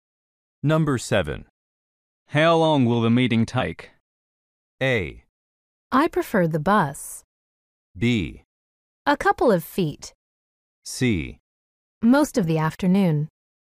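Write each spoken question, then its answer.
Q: How long will the meeting take?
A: C: Most of the afternoon.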